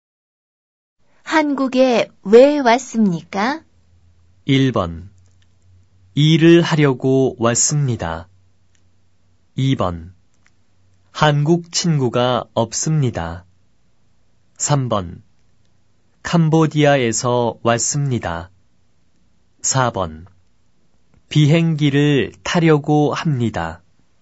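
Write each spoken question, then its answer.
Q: 한국에 왜 왔습니까?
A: 1번: 일을 하려고 왔습니다.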